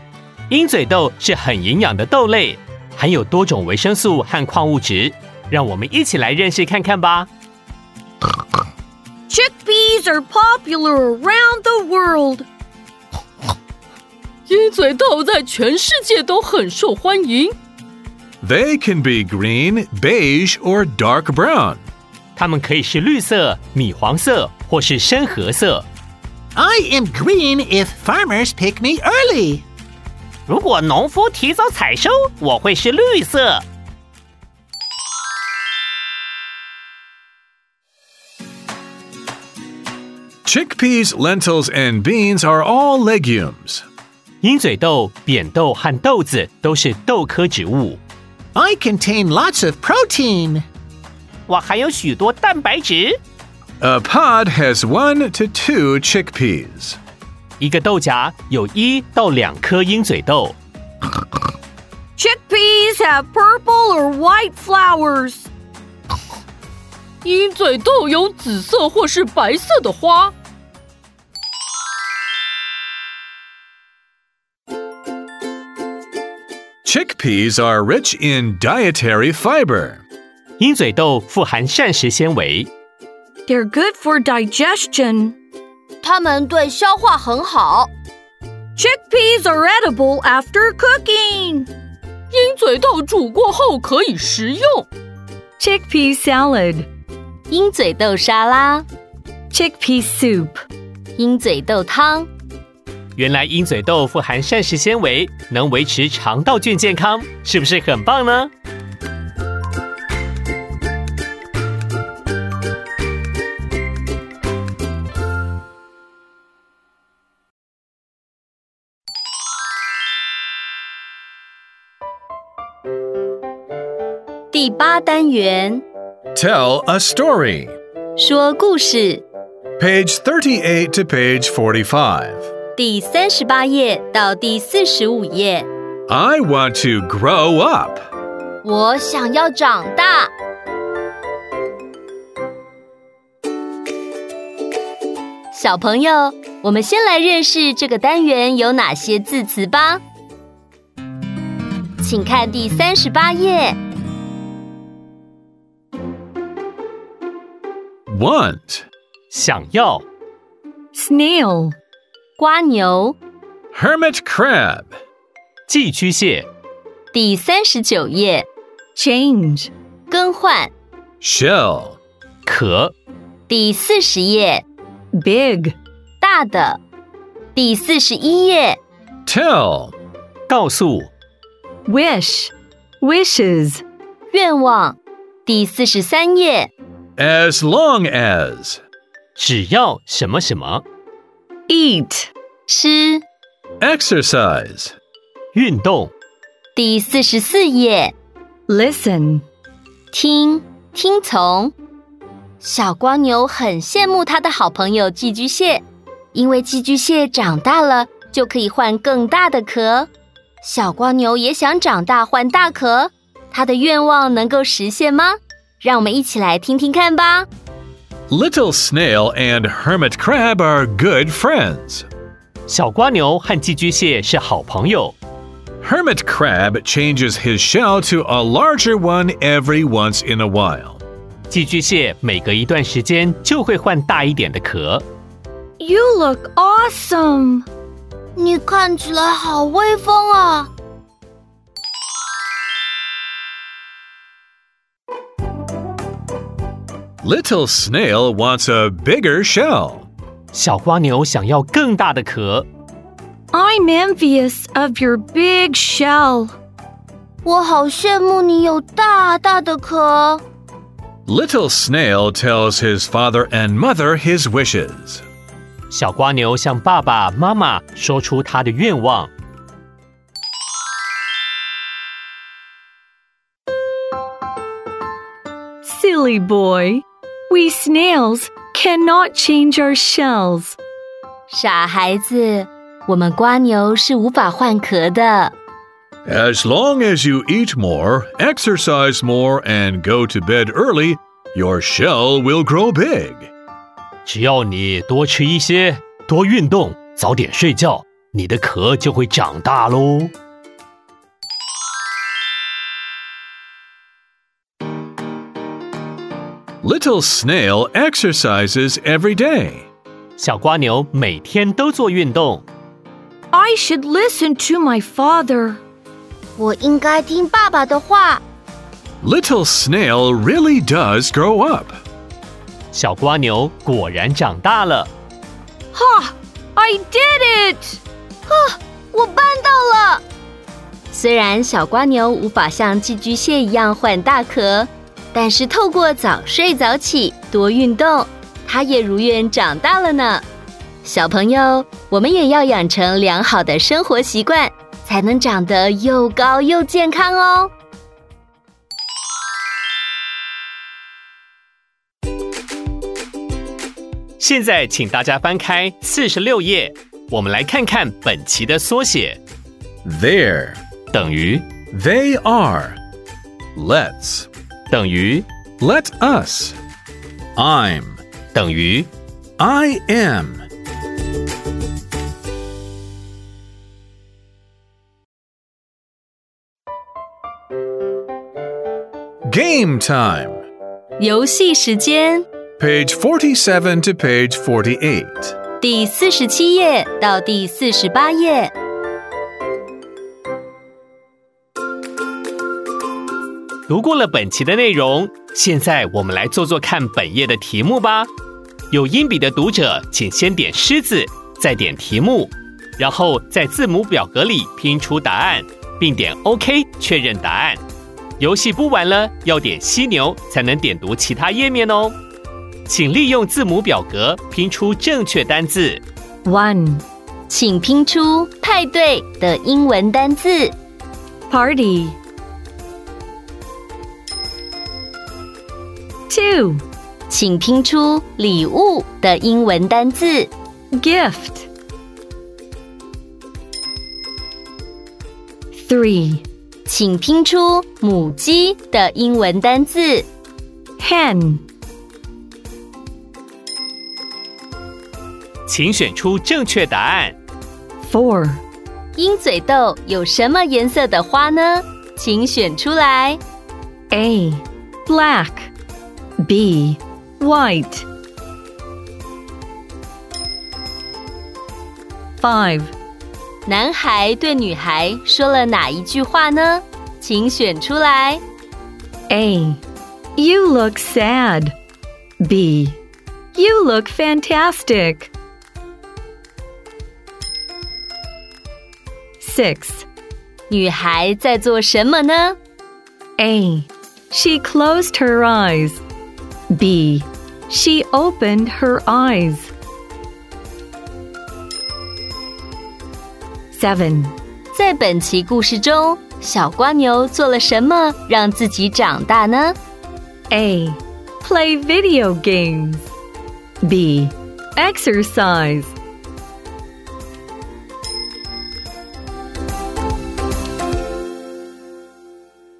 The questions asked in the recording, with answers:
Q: 鹰嘴豆有什么颜色的花呢?请选出来。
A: Bee. White.

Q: 在本期故事中,小瓜牛做了什么让自己长大呢?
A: B. Exercise.